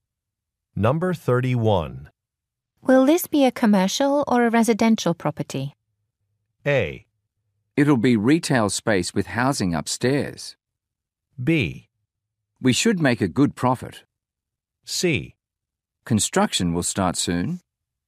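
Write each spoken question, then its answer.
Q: Will this be a commercial or a residential property?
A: A: It'll be retail space with housing upstairs.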